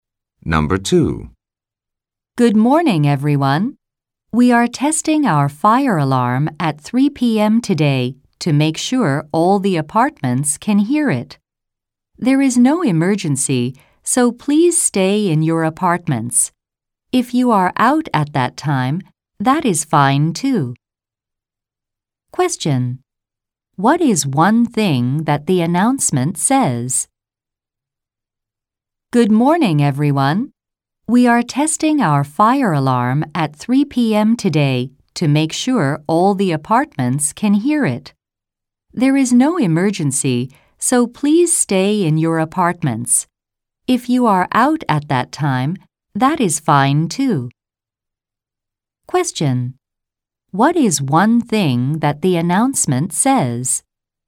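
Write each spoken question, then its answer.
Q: What is one thing that the announcement says?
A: The fire alarm will be tested at 3 p.m. today (there is no emergency).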